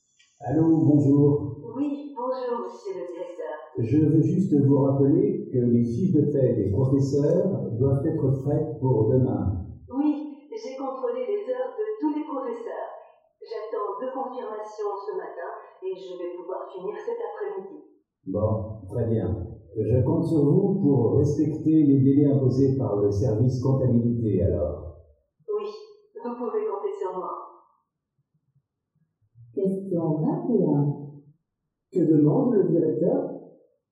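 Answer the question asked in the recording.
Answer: Que les fiches de paie des professeurs soient faites pour demain, dans les délais.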